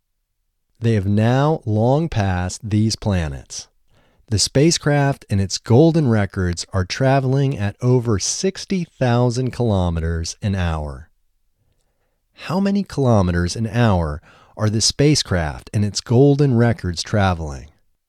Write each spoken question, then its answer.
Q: How many kilometers an hour are the spacecraft and its golden records traveling?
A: The spacecraft and its golden records are traveling at over 60,000 kilometers an hour.